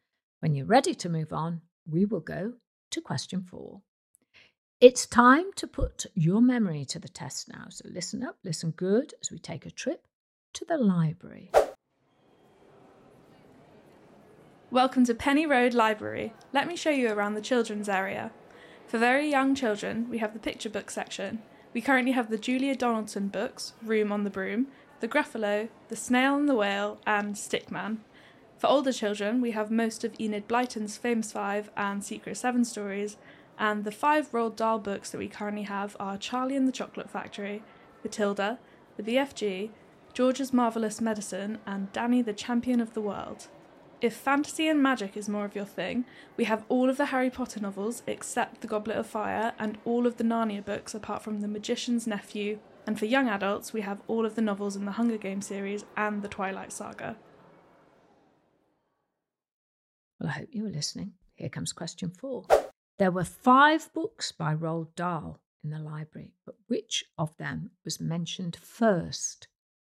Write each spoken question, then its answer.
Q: There were five books by Roald Dahl in the library, but which of them was mentioned first?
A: First book to be mentioned was Charlie and the Chocolate Factory.